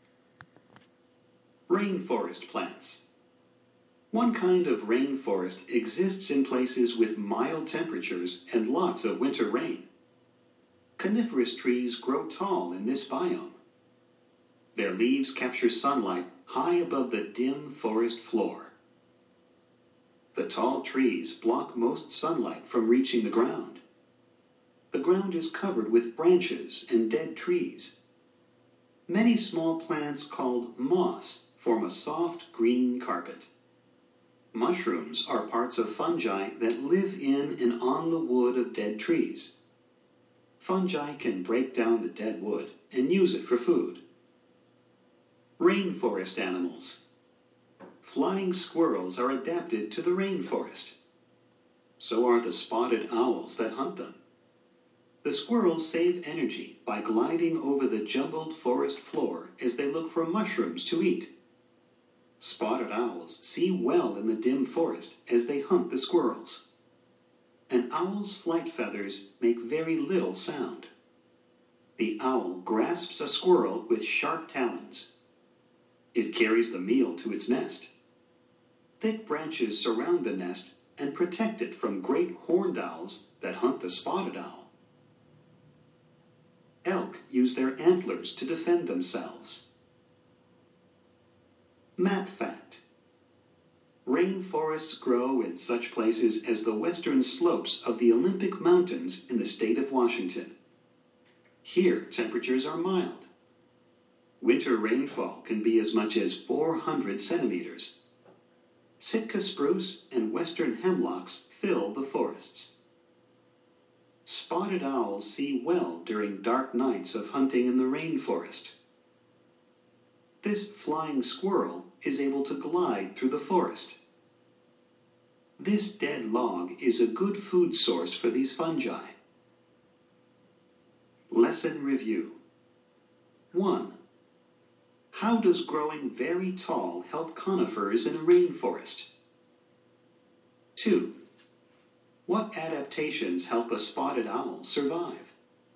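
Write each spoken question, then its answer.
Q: How does growing very tall help conifers in a rainforest?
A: Their leaves capture sunlight high above the dim forest floor.

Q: What adaptations help a spotted owl survive?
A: It sees well in the dim forest, its flight feathers make very little sound, and it has sharp talons.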